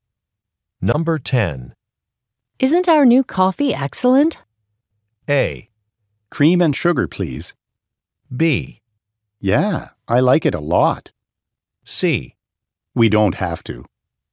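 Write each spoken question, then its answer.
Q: Isn't our new coffee excellent?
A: B: Yeah, I like it a lot.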